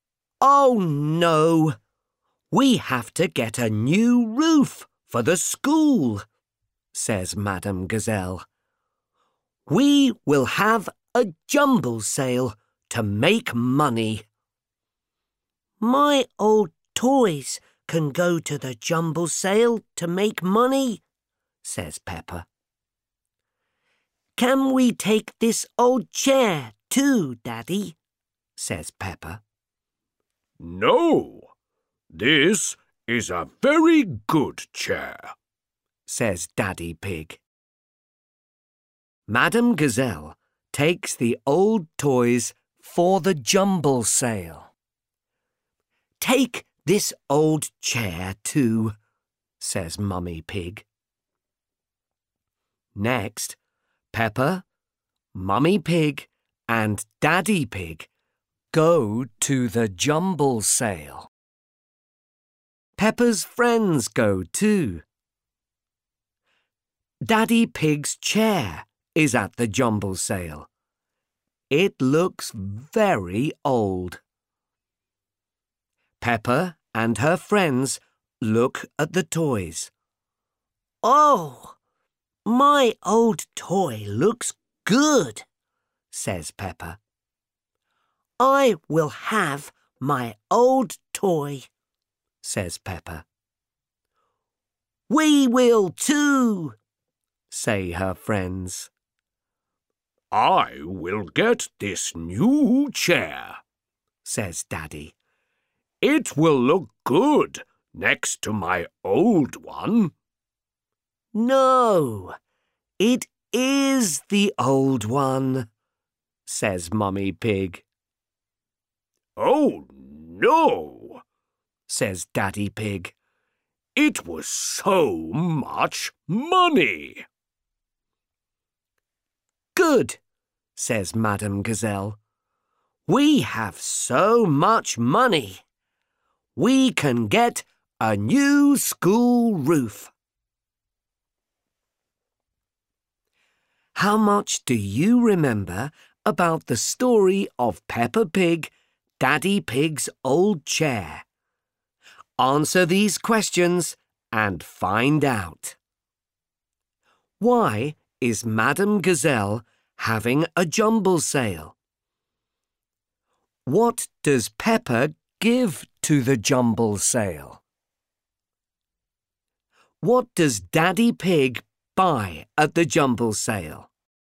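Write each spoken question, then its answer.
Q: Why is Madam Gazelle having a jumble sale?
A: To make money for a new school roof

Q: What does Peppa give to the jumble sale?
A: Her old toys

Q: What does Daddy Pig buy at the jumble sale?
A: His own old chair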